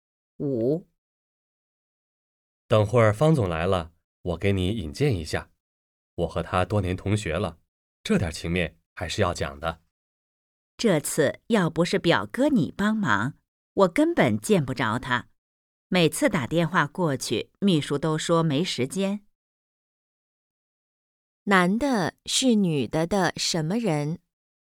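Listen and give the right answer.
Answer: 表哥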